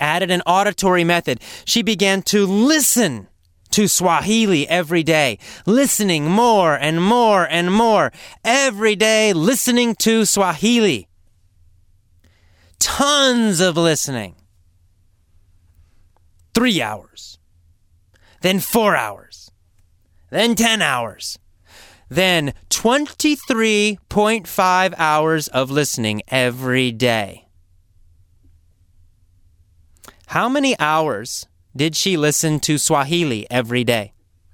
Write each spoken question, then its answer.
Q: How many hours did she listen to Swahili every day?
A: 23.5.